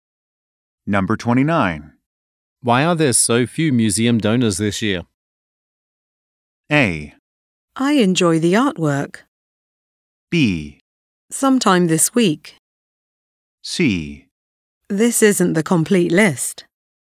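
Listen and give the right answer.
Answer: C: This isn't the complete list.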